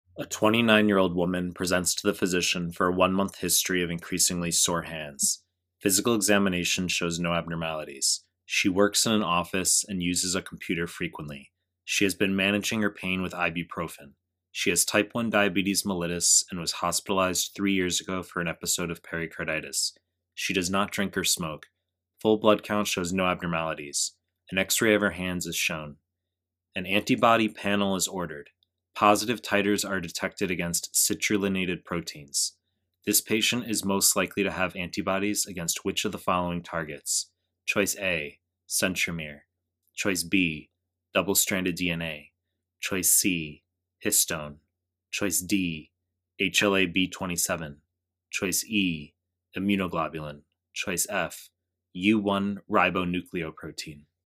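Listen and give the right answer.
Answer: E: immunoglobulin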